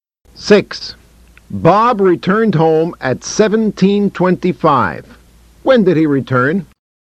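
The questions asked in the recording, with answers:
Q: When did he return?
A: At 17:25 (5:25 p.m.)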